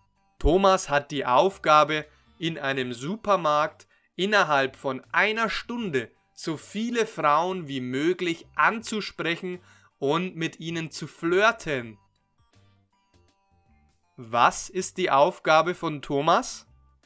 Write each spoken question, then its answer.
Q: Was ist die Aufgabe von Thomas?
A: Seine Aufgabe ist, in einem Supermarkt innerhalb von 1 Stunde so viele Frauen wie möglich anzusprechen und mit ihnen zu flirten.